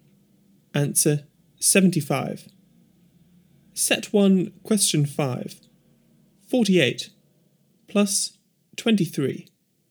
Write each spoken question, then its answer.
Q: 48 plus 23.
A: Answer 71.